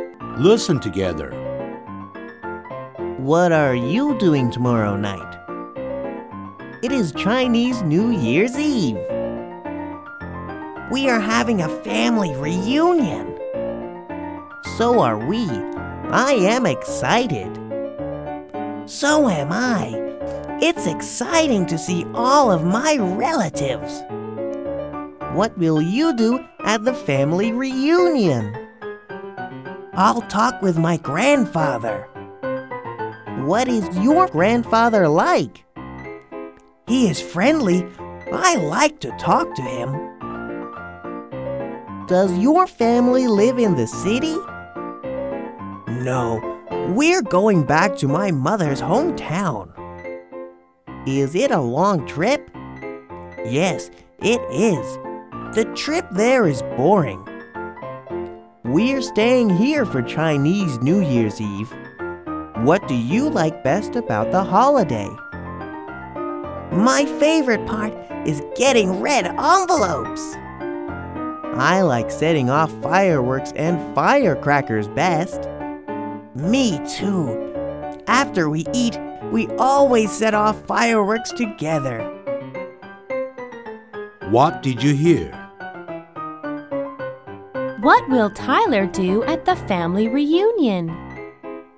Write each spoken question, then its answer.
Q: What will Tyler do at the family reunion?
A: He will talk with his grandfather.